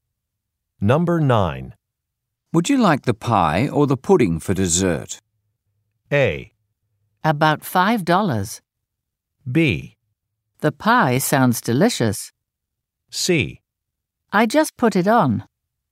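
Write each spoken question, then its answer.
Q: Would you like the pie or the pudding for dessert?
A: B: The pie sounds delicious.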